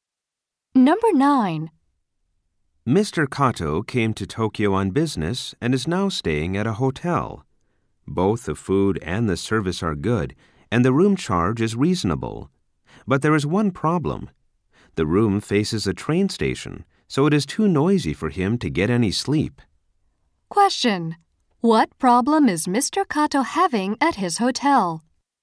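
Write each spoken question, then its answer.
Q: What problem is Mr.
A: His room is too noisy to sleep because it faces a train station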